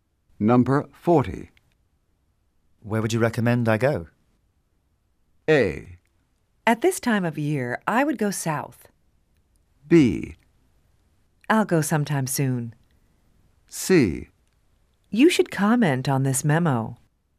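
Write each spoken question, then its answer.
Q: Where would you recommend I go?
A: A: At this time of year, I would go south.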